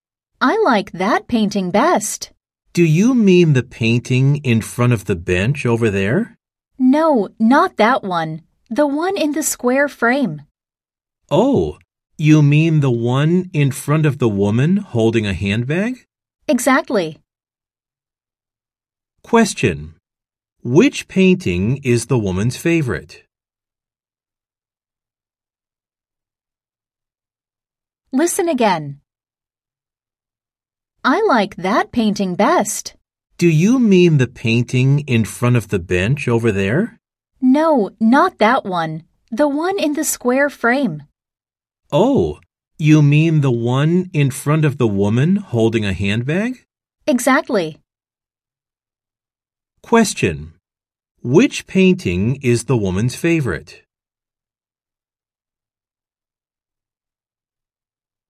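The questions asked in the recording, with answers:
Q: Which painting is the woman's favorite?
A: The one in the square frame, in front of the woman holding a handbag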